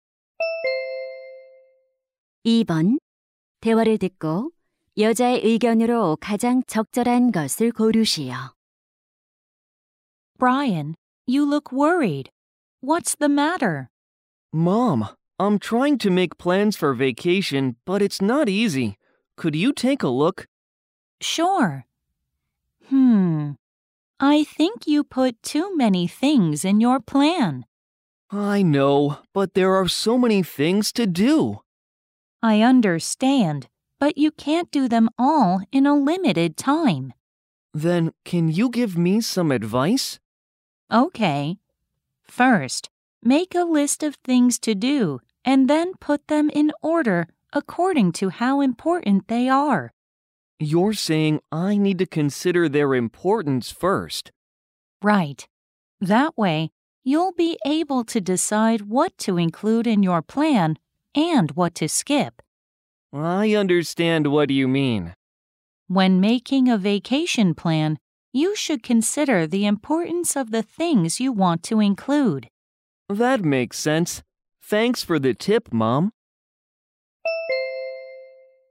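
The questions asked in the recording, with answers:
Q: 대화를 듣고 여자의 의견으로 가장 적절한 것을 고르시오.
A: 방학 계획을 세울 때 할 일의 중요도를 먼저 고려해야 한다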